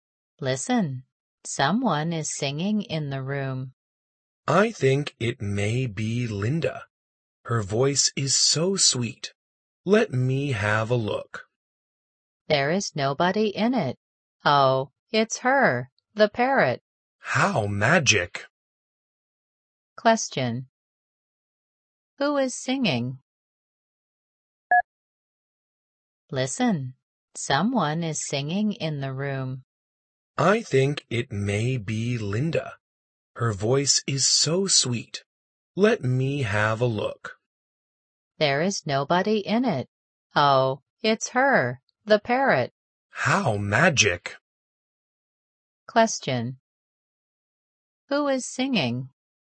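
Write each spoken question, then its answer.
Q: Who is singing?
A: The parrot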